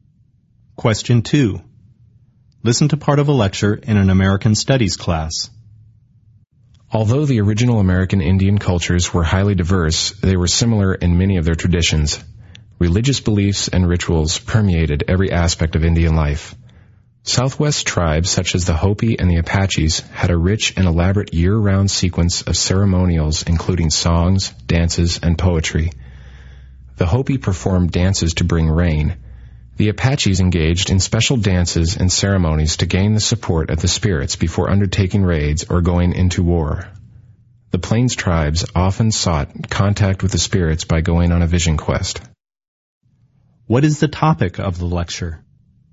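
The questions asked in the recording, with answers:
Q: What is the topic of the lecture?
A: Religious traditions and rituals of American Indian tribes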